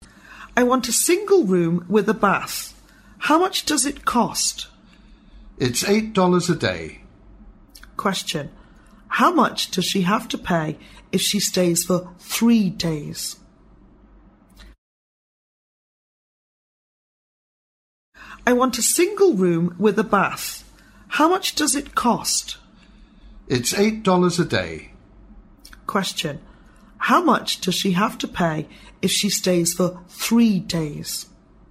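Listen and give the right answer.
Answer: $24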